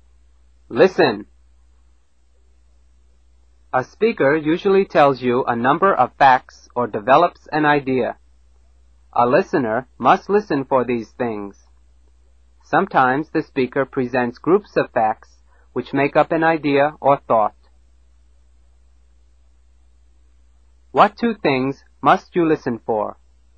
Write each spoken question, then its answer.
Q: What two things must you listen for?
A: A number of facts or a thought.